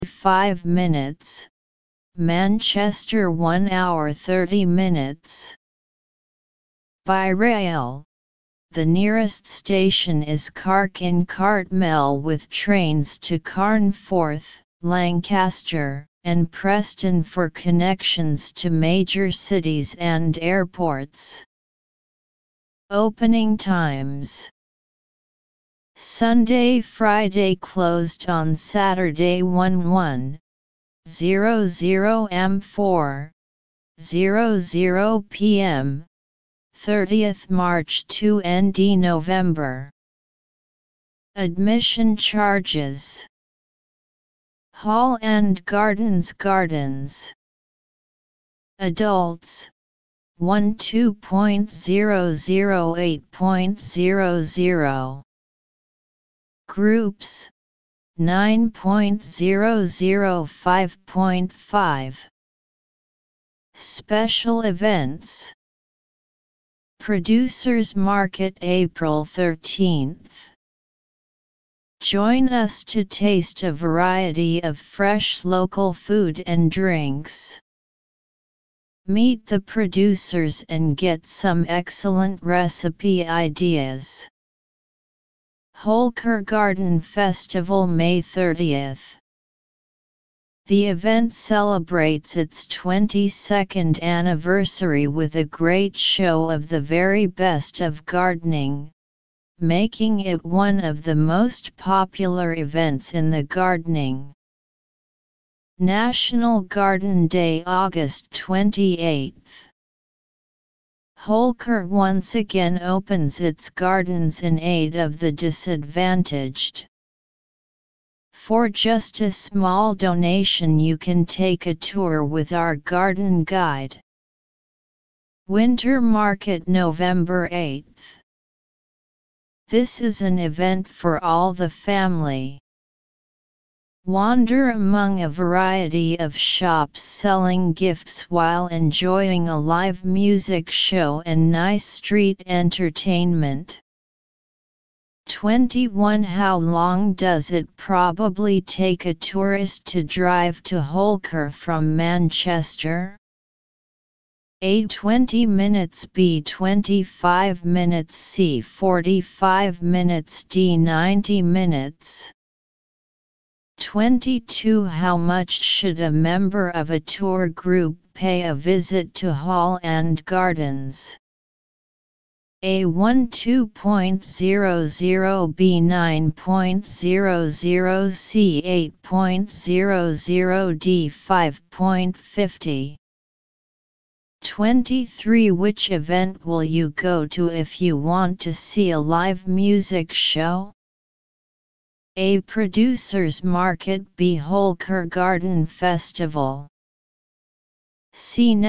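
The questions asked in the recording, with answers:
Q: How long does it probably take a tourist to drive to Holker from Manchester?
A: D: 90 minutes

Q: Which event will you go to if you want to see a live music show?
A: D: Winter Market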